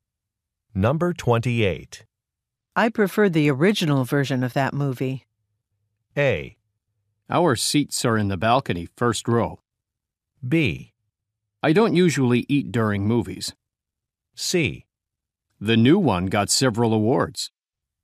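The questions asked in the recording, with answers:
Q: I preferred the original version of that movie.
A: C: The new one got several awards.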